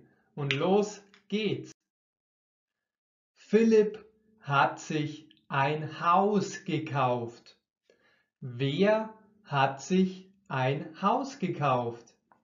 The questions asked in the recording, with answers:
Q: Wer hat sich ein Haus gekauft?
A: Philipp. Philipp hat sich ein Haus gekauft.